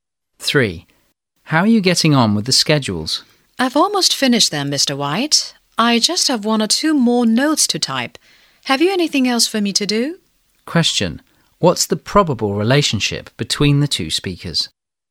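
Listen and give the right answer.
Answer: Boss and secretary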